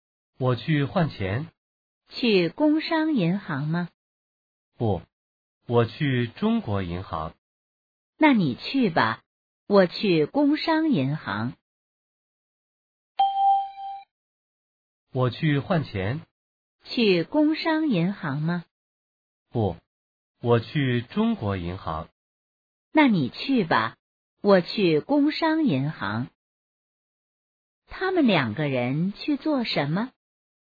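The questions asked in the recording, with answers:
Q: 他们两个人去做什么?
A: 换钱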